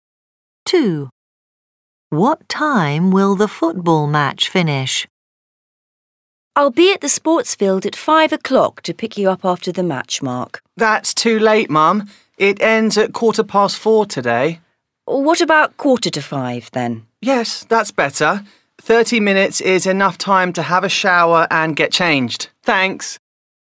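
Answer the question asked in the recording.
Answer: 4:15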